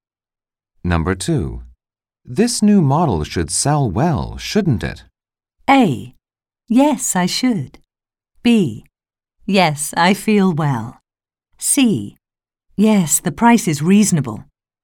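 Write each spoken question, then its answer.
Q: This new model should sell well, shouldn't it?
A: C: Yes, the price is reasonable.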